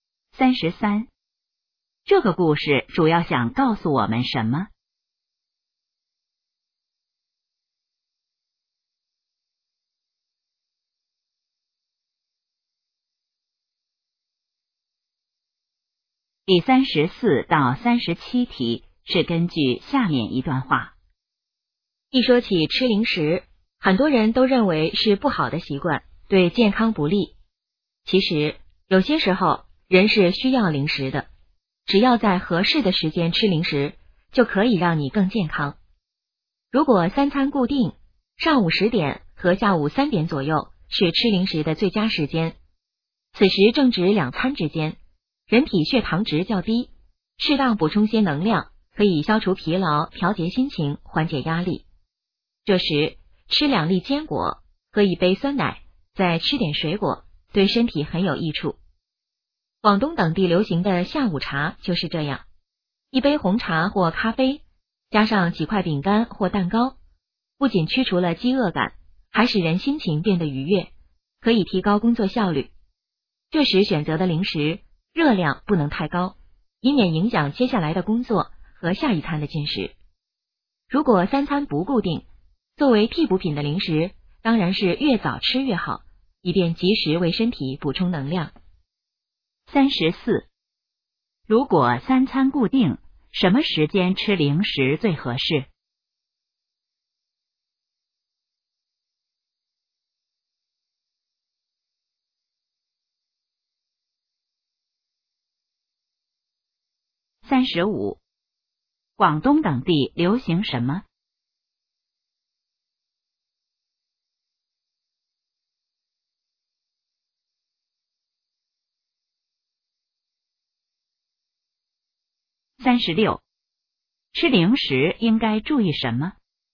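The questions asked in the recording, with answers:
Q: 如果三餐固定,什么时间吃零食最合适?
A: 上午10点和下午3点左右

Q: 广东等地流行什么?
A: 下午茶

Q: 吃零食应该注意什么?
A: 热量不能太高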